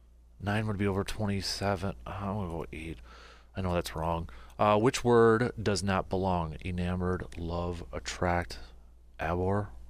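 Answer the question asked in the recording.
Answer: abhor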